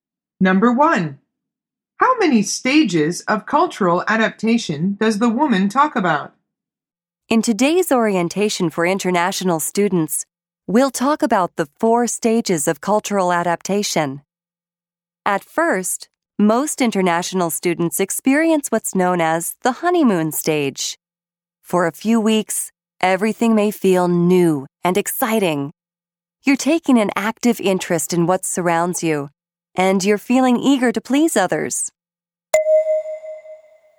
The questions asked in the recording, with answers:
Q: How many stages of cultural adaptation does the woman talk about?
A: The answer is four.